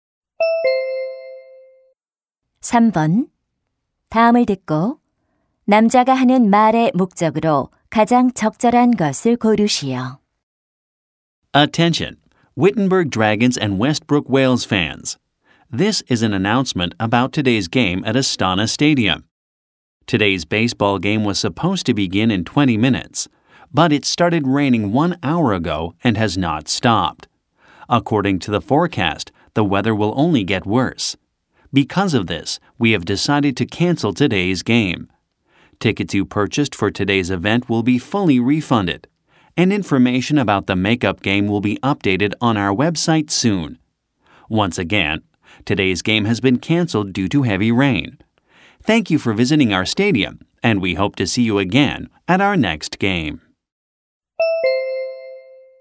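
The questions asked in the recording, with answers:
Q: 다음을 듣고 남자가 하는 말의 목적으로 가장 적절한 것을 고르시오.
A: 비로 인한 오늘 야구 경기 취소를 알리려고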